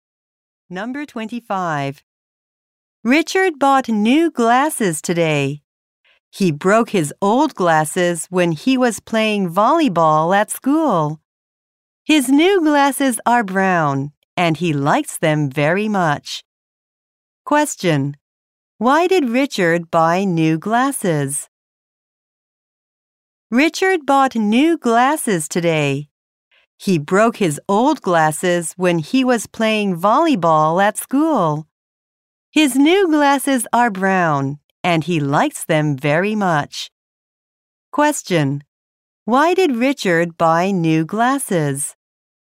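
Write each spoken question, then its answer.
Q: Question: Why did Richard buy new glasses?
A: He broke his old glasses.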